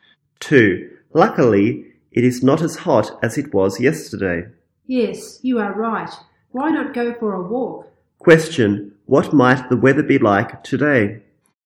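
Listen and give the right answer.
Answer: Not as hot as yesterday.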